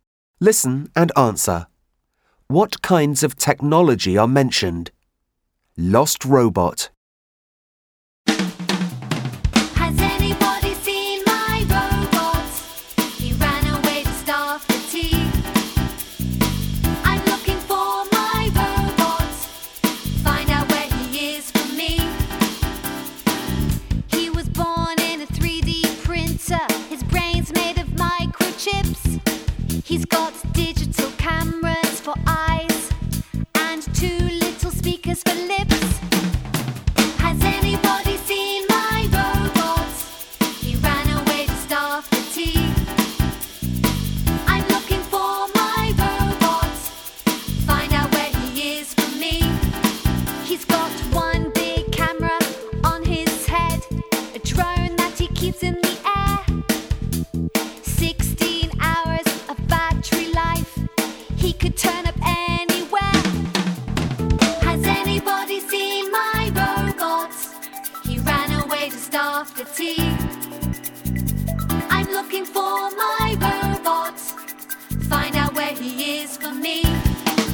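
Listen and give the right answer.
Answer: a robot, a 3D printer, microchips, digital cameras, speakers and a drone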